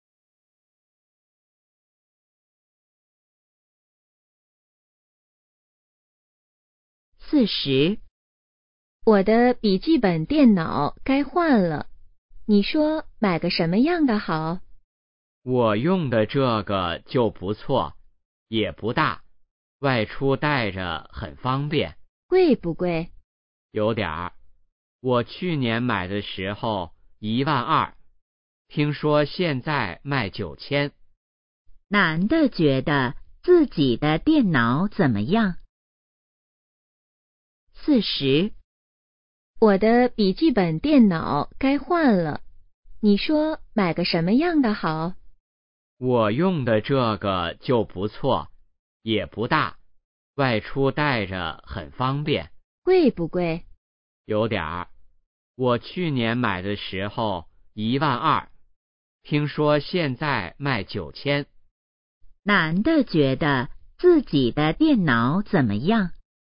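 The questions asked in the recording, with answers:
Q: 男的觉得自己的电脑怎么样?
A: 不错,不大,带着方便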